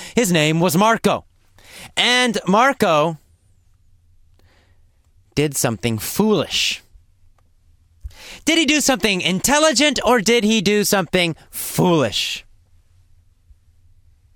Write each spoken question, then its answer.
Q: Did he do something intelligent or did he do something foolish?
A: Well, he did something foolish.